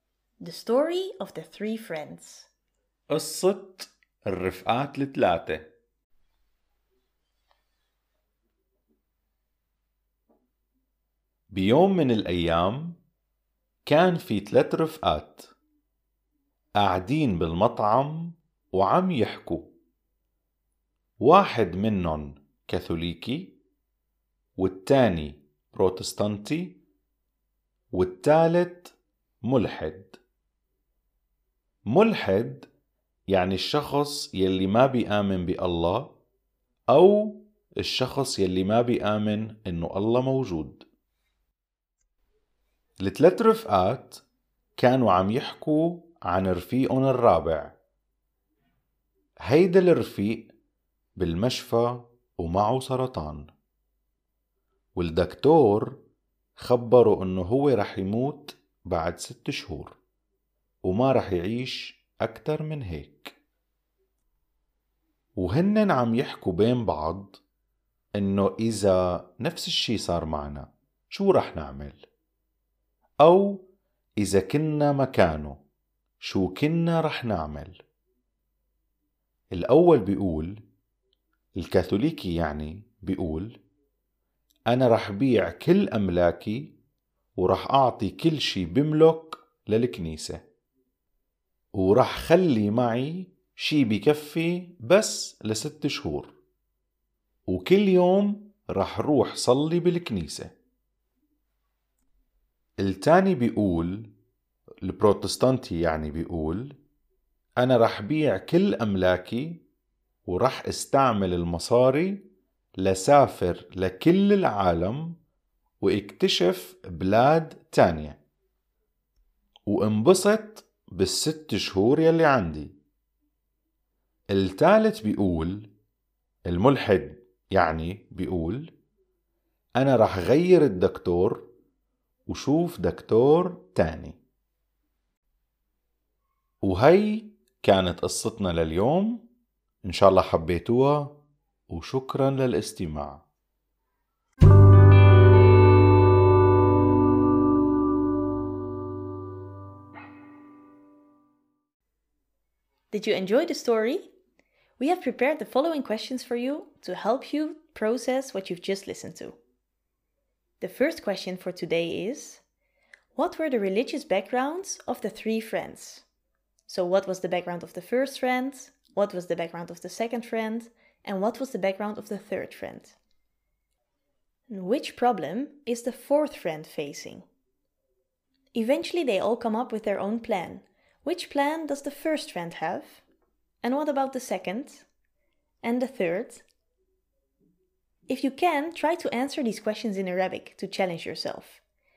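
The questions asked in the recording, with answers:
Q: So, what was the background of the first friend?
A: Catholic

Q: What was the background of the second friend?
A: Protestant

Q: And what was the background of the third friend?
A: Atheist

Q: Which problem is the fourth friend facing?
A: He is in hospital with cancer and has six months to live

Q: Eventually, they all come up with their own plan, which plan does the first friend have?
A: Sell all his properties, give everything to the church, and pray at church every day

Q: And what about the second?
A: Sell his properties and use the money to travel the world and enjoy himself

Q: And the third?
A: Change his doctor and see another doctor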